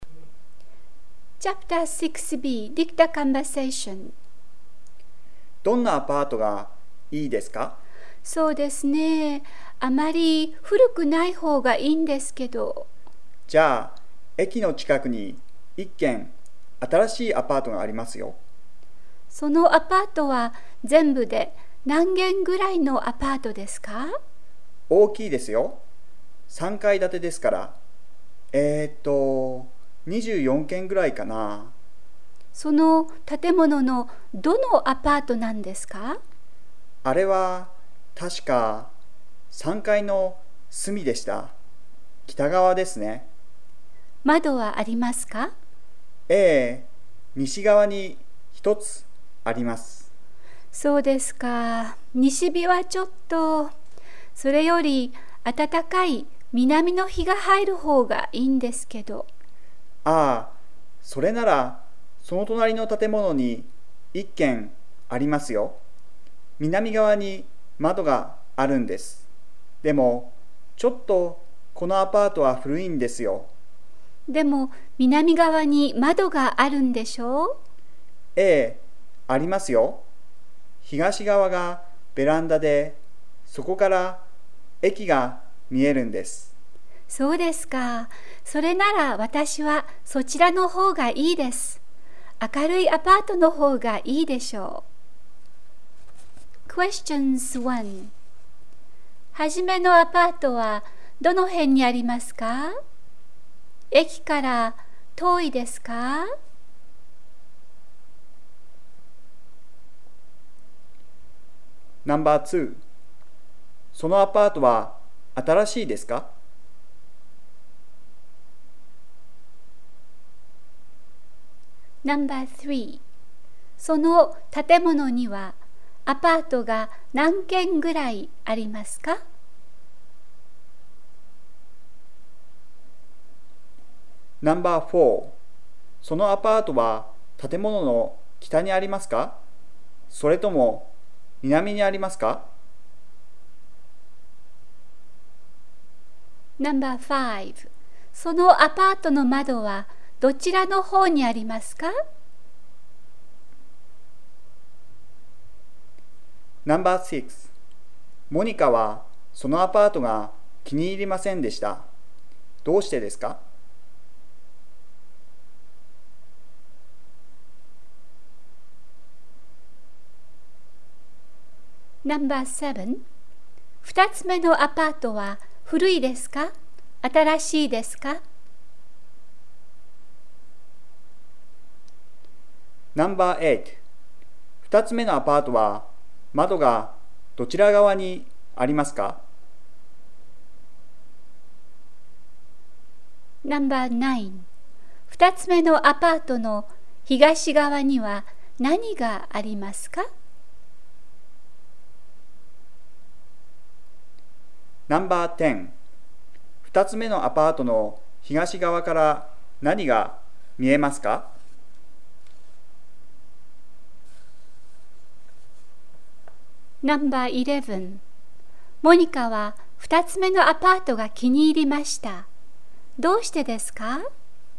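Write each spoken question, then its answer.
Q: はじめのアパートはどの辺にありますか?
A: 駅の近く

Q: 駅から遠いですか?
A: いいえ、近いです

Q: そのアパートは新しいですか?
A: はい、新しいです

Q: その建物にはアパートが何軒ぐらいありますか?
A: 24軒ぐらい

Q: そのアパートの窓はどちらの方にありますか?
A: 西側

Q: どうしてですか?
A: 窓が西側で西日が入るから

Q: 二つ目のアパートは古いですか?新しいですか?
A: 古い

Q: 二つ目のアパートは窓がどちら側にありますか?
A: 南側

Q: 二つ目のアパートの東側には何がありますか?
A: ベランダ

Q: モニカは2つ目のアパートが気に入りました。どうしてですか?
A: 南側に窓があって明るいから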